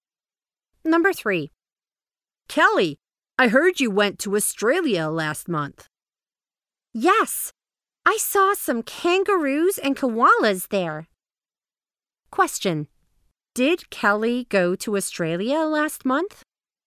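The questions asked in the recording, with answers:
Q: Did Kelly go to Australia last month?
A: Yes, she did.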